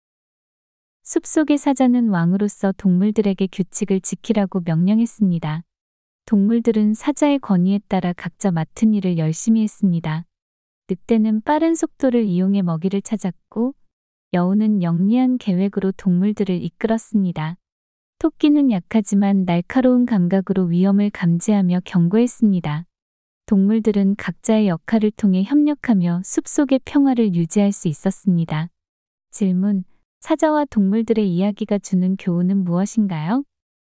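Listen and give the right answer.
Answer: 각자의 역할을 다하며 협력하면 평화를 유지할 수 있다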